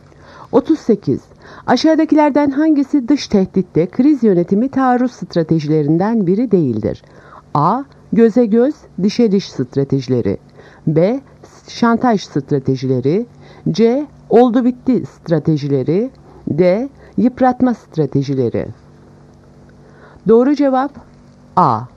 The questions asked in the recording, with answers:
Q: Aşağıdakilerden hangisi dış tehditte kriz yönetimi taarruz stratejilerinden biri değildir?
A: Doğru cevap A. Göze göz, dişe diş stratejileri.